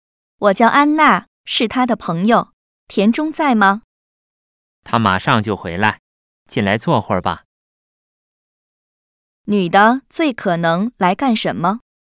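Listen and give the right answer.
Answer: 找朋友田中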